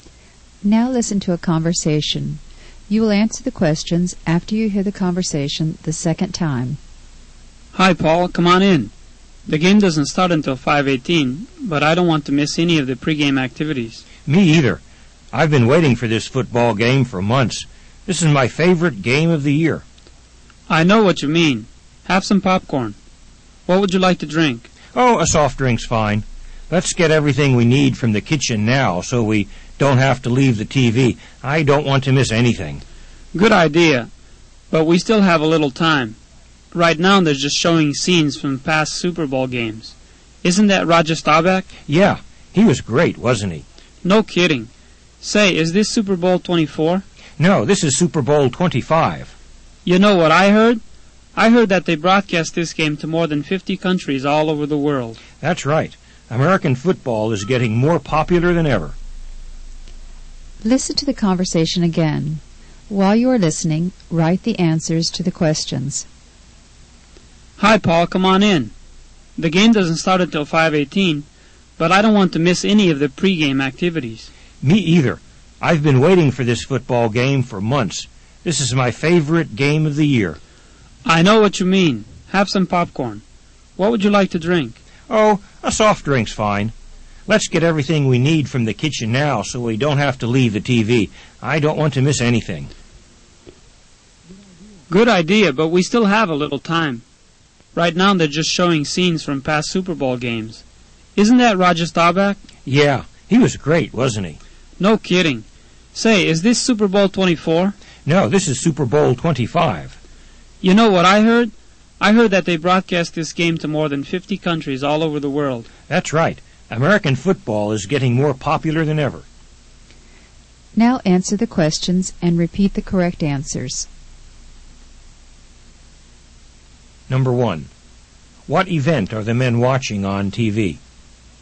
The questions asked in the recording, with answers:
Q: What event are the men watching on TV?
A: they're watching a football game, the Super Bowl.